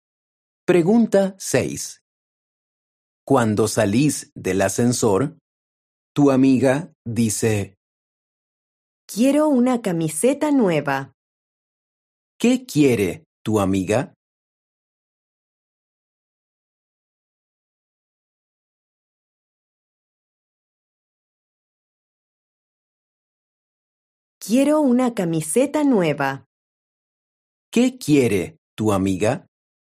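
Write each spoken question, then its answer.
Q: ¿Qué quiere tu amiga?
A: una camiseta nueva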